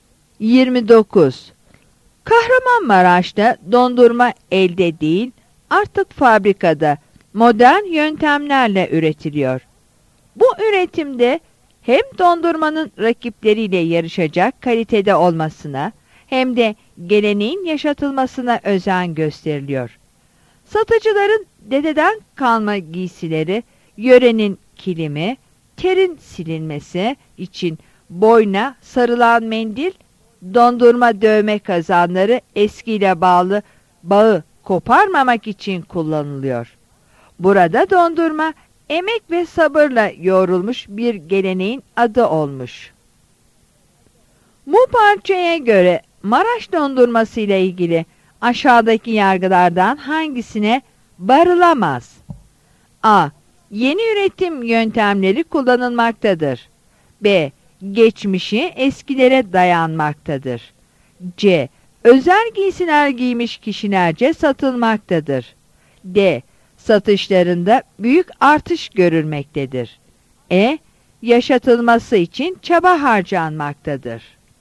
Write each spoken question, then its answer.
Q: Bu parçaya göre Maraş dondurması ile ilgili aşağıdaki yargılardan hangisine varılamaz?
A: Yanıt D'dir.